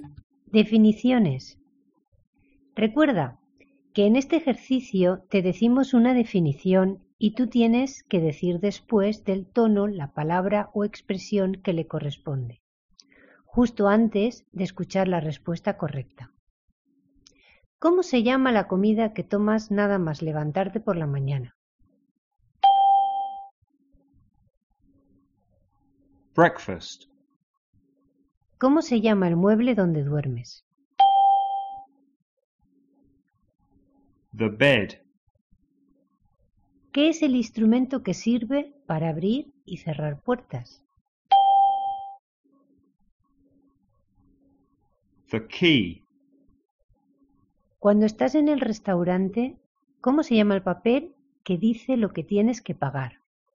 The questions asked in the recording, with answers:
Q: ¿Cómo se llama la comida que tomas nada más levantarte por la mañana?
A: Breakfast.

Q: ¿Cómo se llama el mueble donde duermes?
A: The bed.

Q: ¿Qué es el instrumento que sirve para abrir y cerrar puertas?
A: The key.